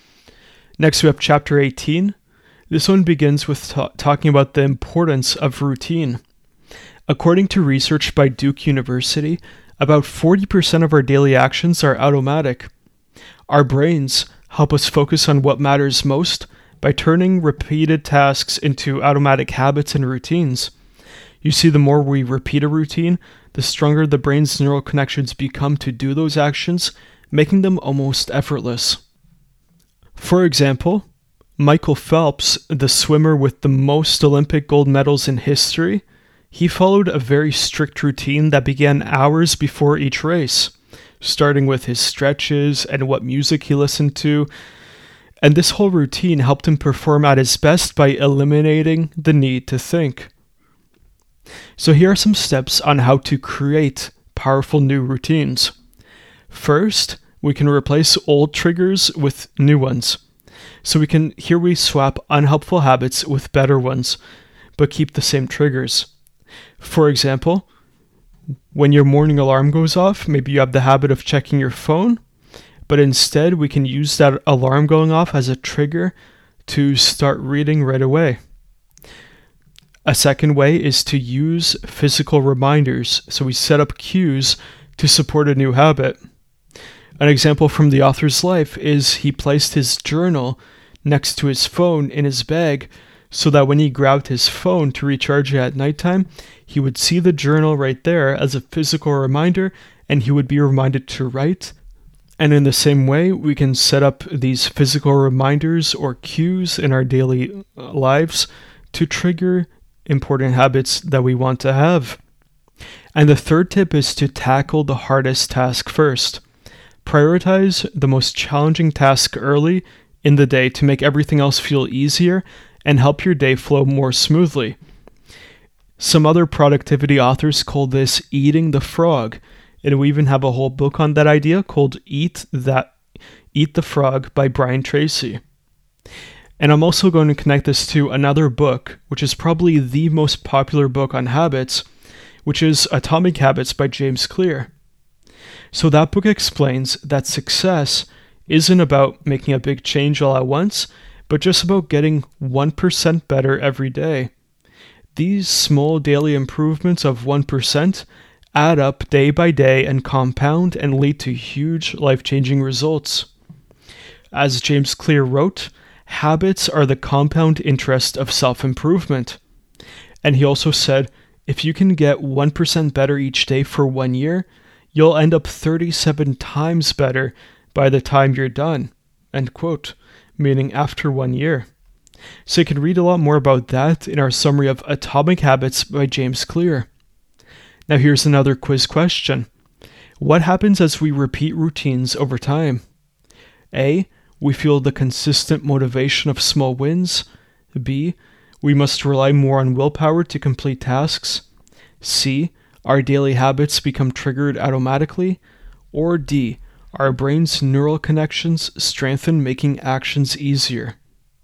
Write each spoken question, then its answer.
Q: What happens as we repeat routines over time?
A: So the correct answer is D.